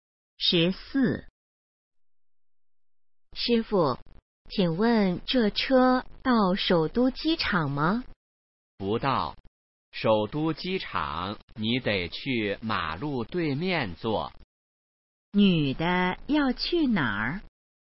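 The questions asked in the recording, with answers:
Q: 女的要去哪儿?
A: 首都机场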